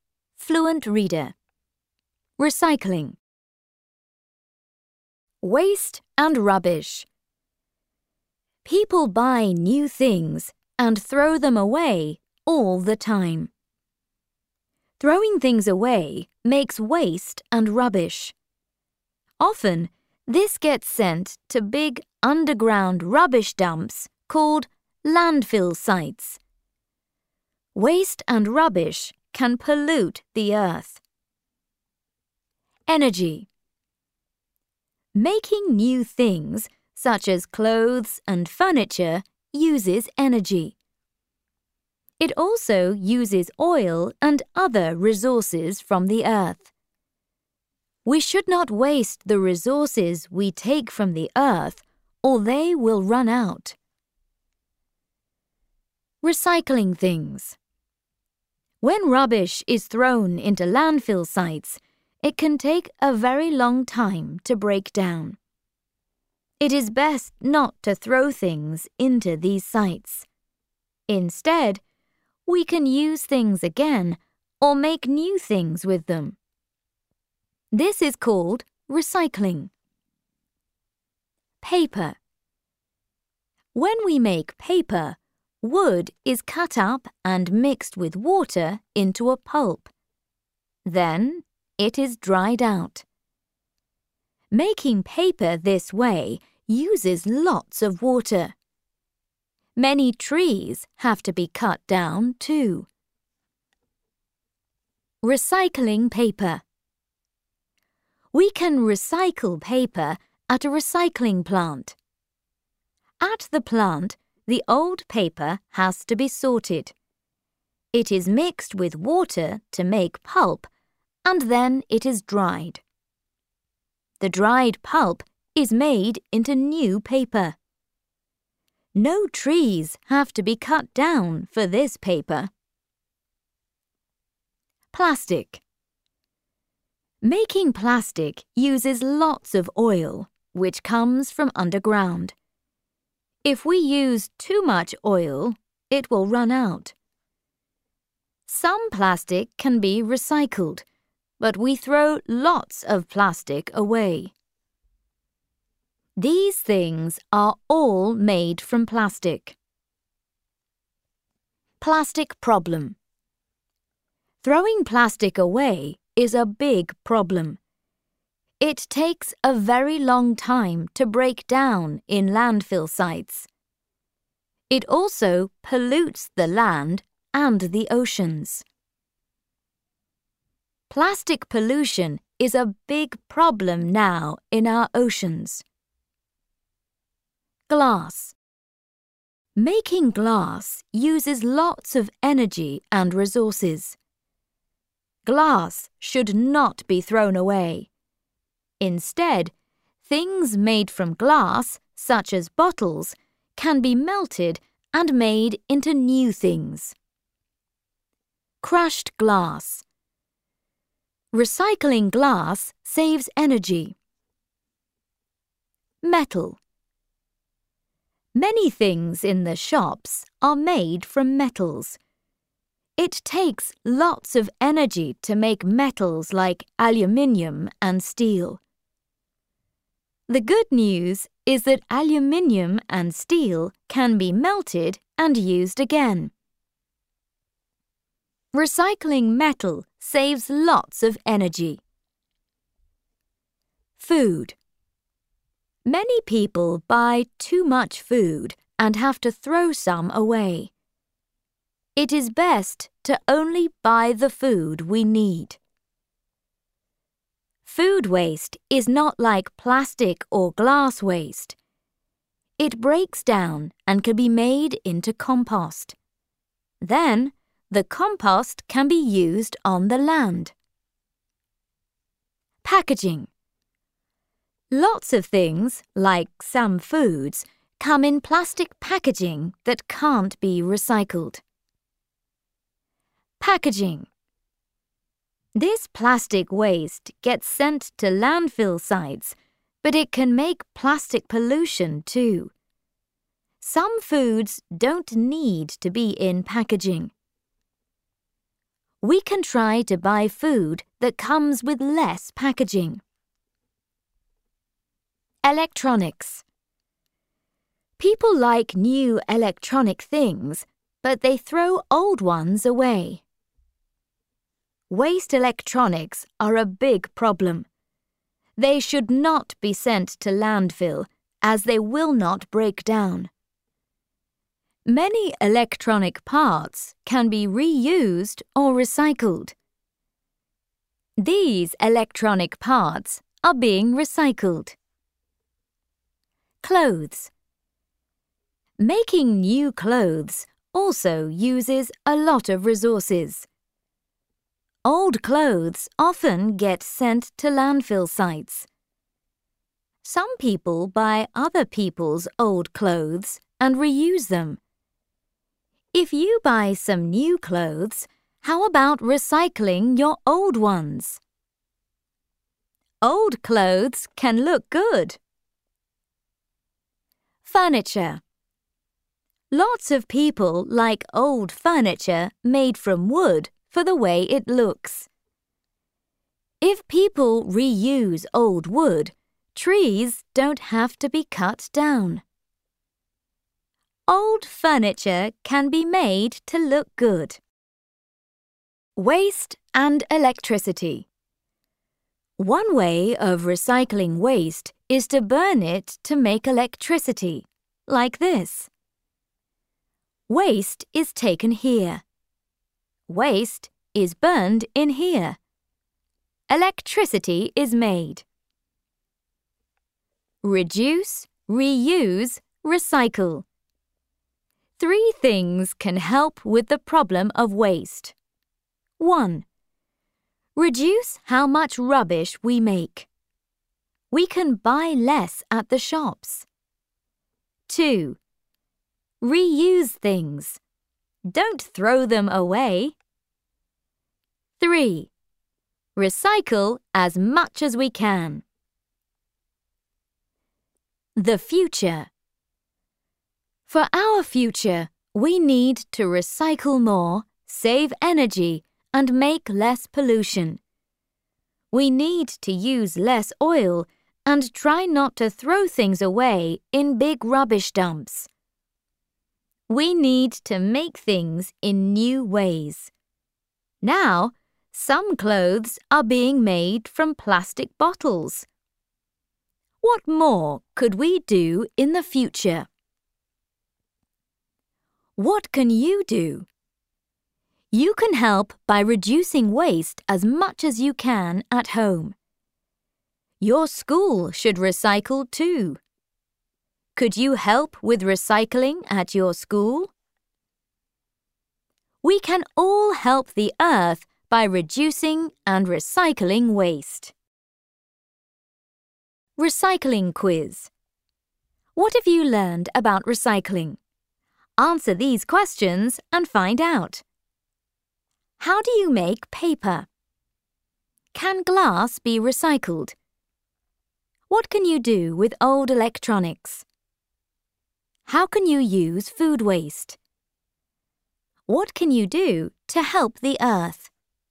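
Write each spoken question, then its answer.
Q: How do you make paper?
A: Wood is cut up and mixed with water into a pulp, then dried out

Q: Can glass be recycled?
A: Yes, it can be melted and made into new things

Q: What can you do with old electronics?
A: Reuse or recycle their parts

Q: How can you use food waste?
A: Make it into compost to use on the land

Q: What can you do to help the earth?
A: Reduce, reuse and recycle waste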